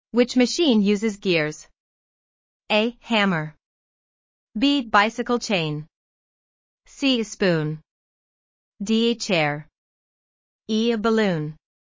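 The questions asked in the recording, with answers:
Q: Which machine uses gears?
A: B: Bicycle chain.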